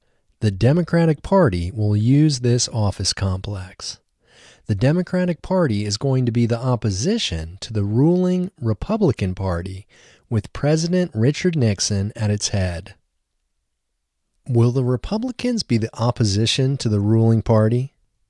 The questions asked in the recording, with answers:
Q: Will the Republicans be the opposition to the ruling party?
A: No, the Republicans won't be the opposition to the ruling party.